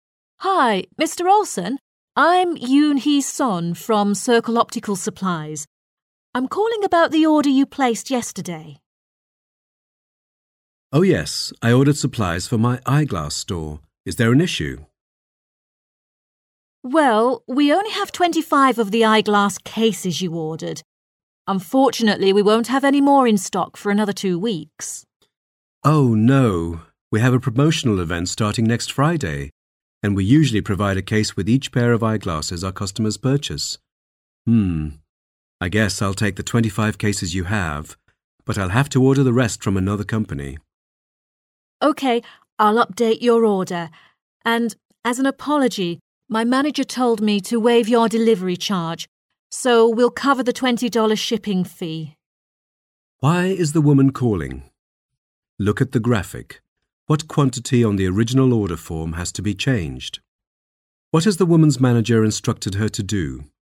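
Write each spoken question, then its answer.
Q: Why is the woman calling?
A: To say that some of the eyeglass cases he ordered are not in stock

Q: What has the woman's manager instructed her to do?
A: Waive the $20 delivery charge

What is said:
I'm calling about the order you placed yesterday. M: Oh, yes—I ordered supplies for my eyeglass store. Is there an issue? W: Well, we only have 25 of the eyeglass cases you ordered. Unfortunately, we won't have any more in stock for another two weeks. M: Oh, no—we have a promotional event starting next Friday, and we usually provide a case with each pair of eyeglasses our customers purchase. I guess I'll take the 25 cases you have, but I'll have to order the rest from another company. W: OK—I'll update your order. And as an apology, my manager told me to waive your delivery charge.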